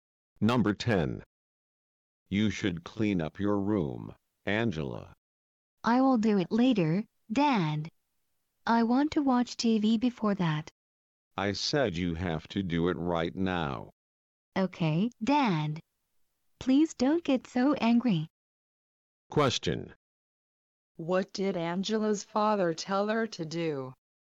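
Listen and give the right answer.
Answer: Clean up her room right now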